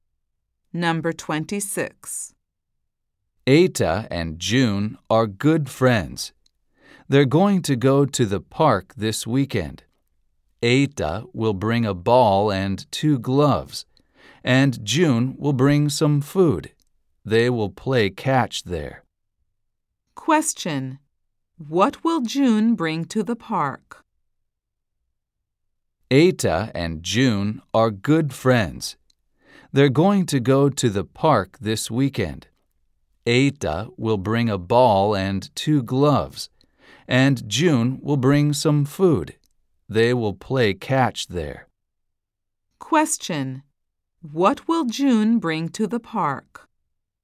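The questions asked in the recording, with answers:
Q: What will June bring to the park?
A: Some food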